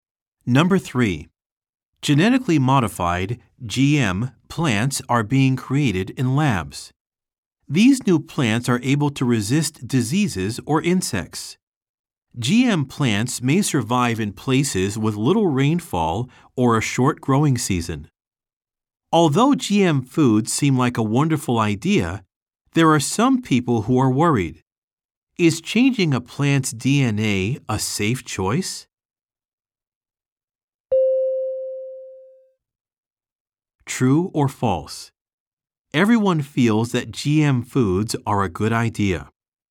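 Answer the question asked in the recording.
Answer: False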